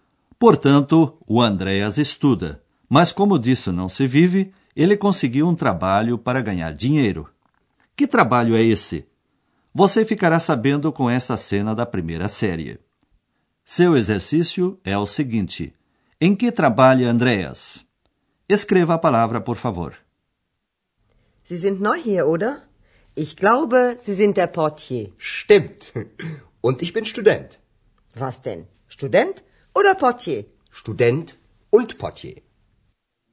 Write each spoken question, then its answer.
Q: Em que trabalha Andreas?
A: Sua profissão é portier.